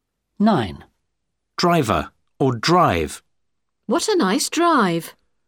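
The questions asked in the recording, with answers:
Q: Driver or drive.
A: drive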